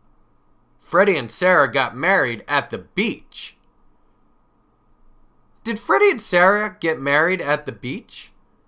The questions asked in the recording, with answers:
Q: Did Freddie and Sarah get married at the beach?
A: Yes, they did. Freddie and Sarah got married at the beach.